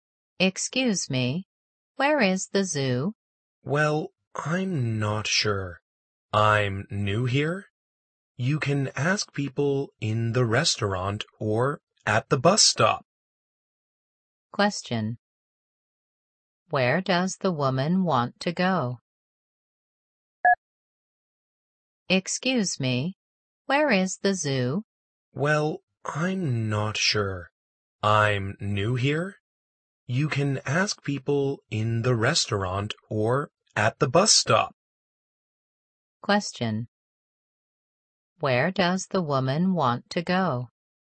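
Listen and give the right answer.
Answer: The zoo.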